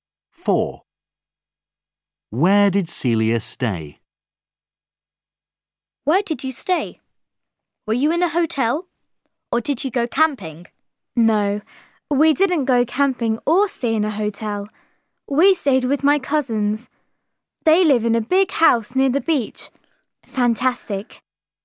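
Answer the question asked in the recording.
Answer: With her cousins.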